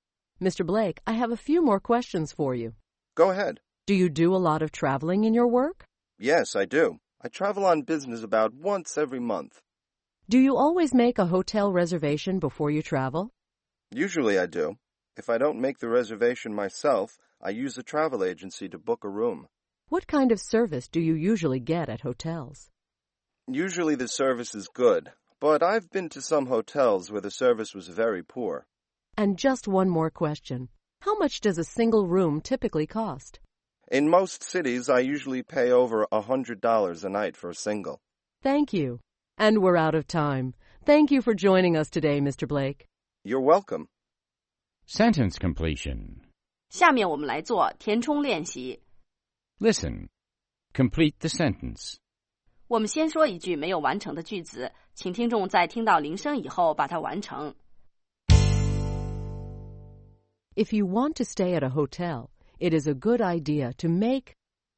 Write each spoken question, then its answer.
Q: If you want to stay at a hotel, it is a good idea to make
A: a reservation. It's a good idea to make a reservation.